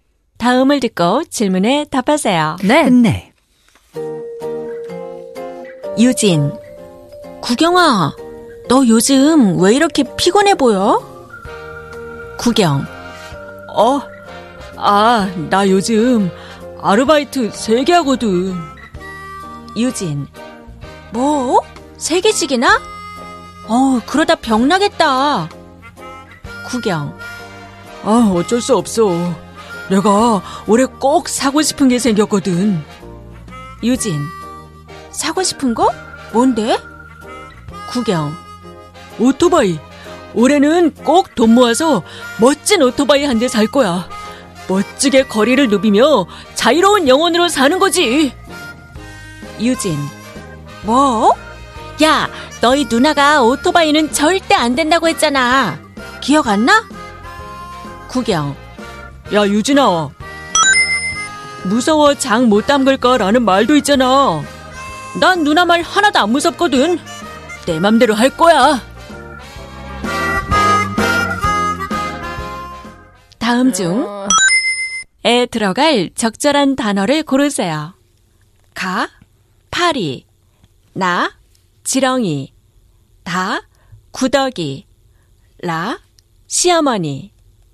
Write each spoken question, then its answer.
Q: 다음 중 에 들어갈 적절한 단어를 고르세요.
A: But the answer is 다, 구더기 무서워, 장 못 담글까?